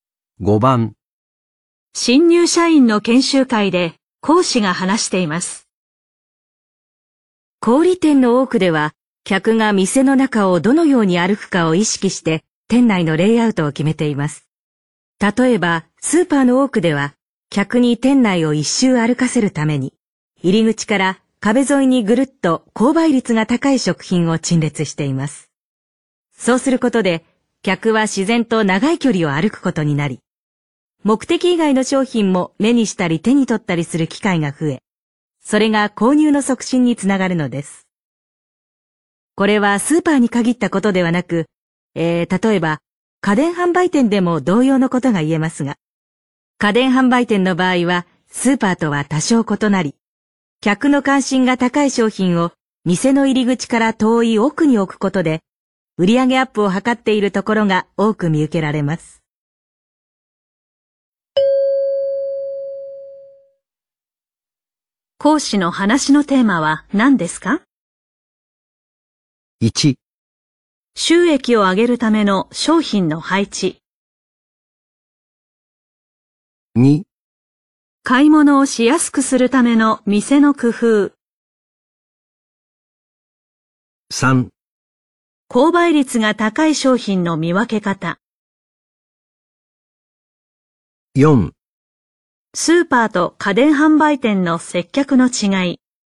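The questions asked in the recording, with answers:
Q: 講師の話のテーマは何ですか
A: 1: 収益を上げるための商品の配置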